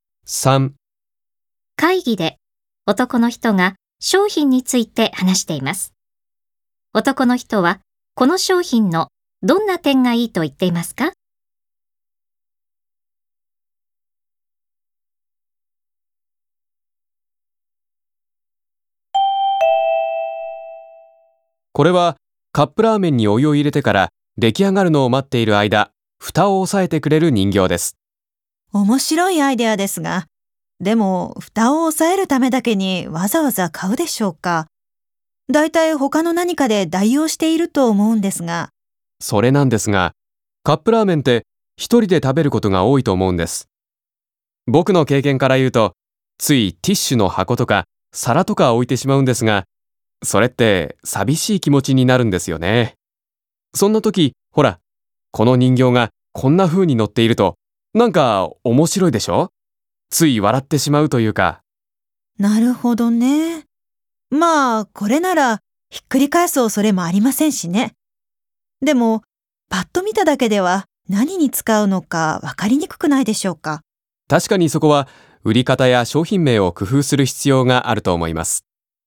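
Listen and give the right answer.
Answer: 一人でカップラーメンを食べる時に、見ると面白くて笑ってしまい、寂しい気持ちにならない点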